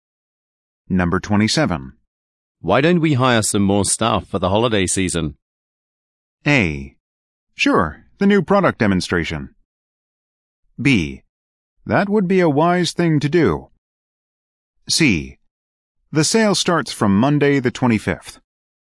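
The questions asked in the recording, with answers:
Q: Why don't we hire some more staff for the holiday season?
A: B: That would be a wise thing to do.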